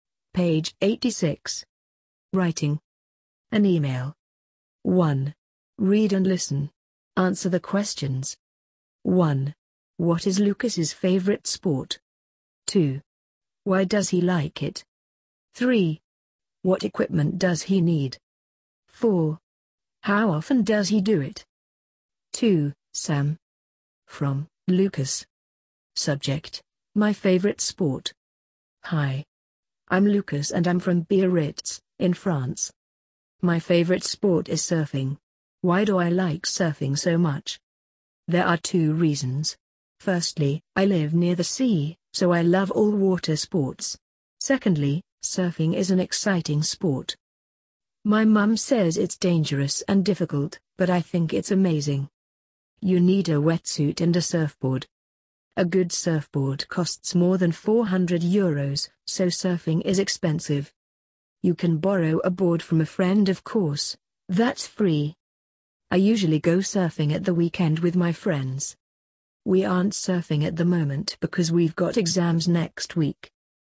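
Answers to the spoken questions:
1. Surfing
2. He lives near the sea and loves water sports, and surfing is exciting
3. A wetsuit and a surfboard
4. Usually at the weekend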